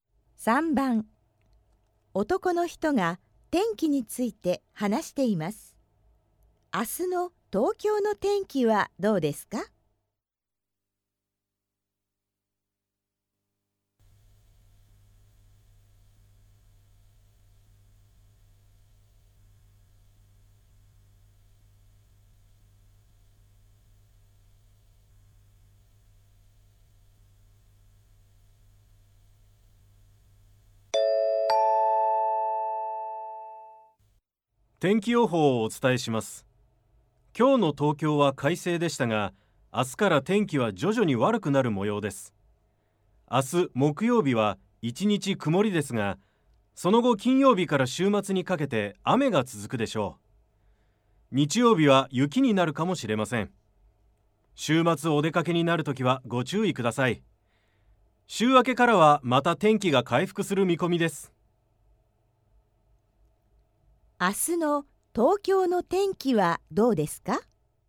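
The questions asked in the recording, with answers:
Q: 明日の東京の天気はどうですか?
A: 1日曇り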